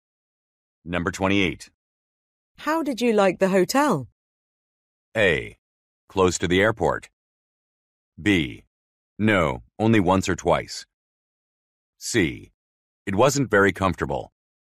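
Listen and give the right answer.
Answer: C: It wasn't very comfortable.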